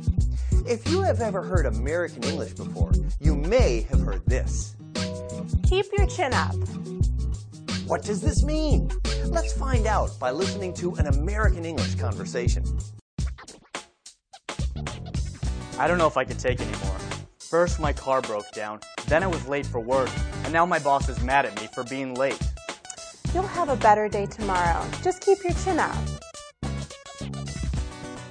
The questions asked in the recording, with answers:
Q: What does this mean?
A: Keep your chin up means to keep your spirits high and remain cheerful in a difficult situation.